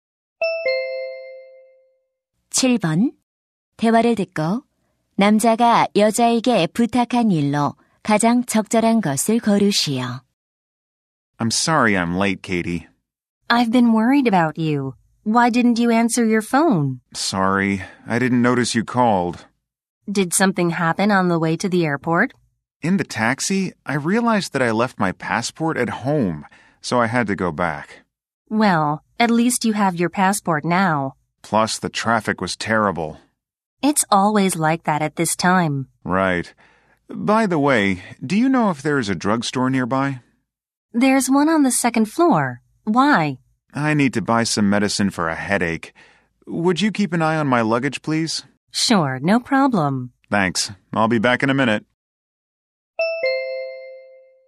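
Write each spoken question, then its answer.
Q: 대화를 듣고 남자가 여자에게 부탁한 일로 가장 적절한 것을 고르시오.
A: 짐 봐 주기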